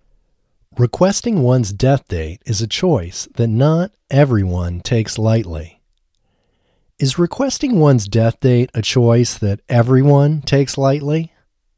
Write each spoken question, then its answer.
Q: Is requesting one's death date a choice that everyone takes lightly?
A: No, requesting one's death date is a choice that not everyone takes lightly.